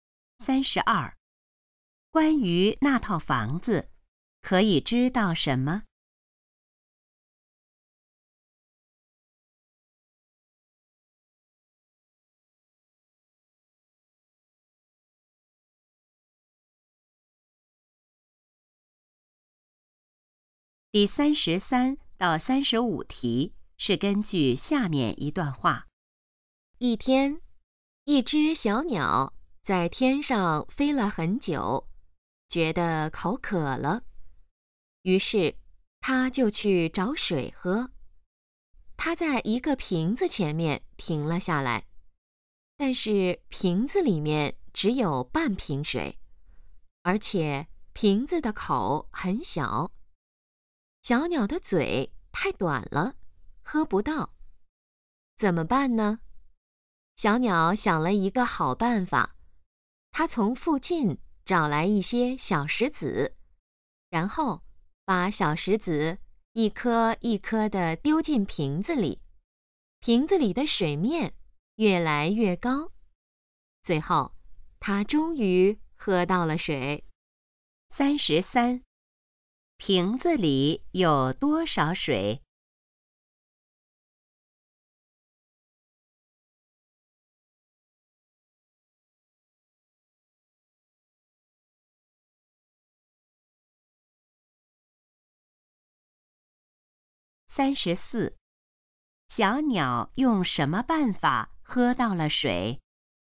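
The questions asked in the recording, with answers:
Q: 瓶子里有多少水?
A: 半瓶水

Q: 小鸟用什么办法喝到了水?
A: 把小石子一颗一颗丢进瓶子里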